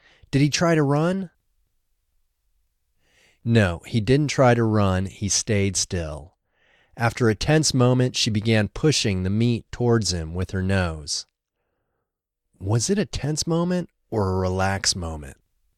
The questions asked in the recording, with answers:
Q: Was it a tense moment or a relaxed moment?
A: It was a tense moment.